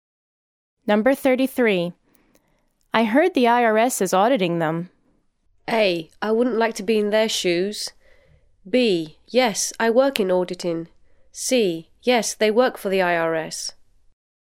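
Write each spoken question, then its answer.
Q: I heard the IRS is auditing them.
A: A: I wouldn't like to be in their shoes.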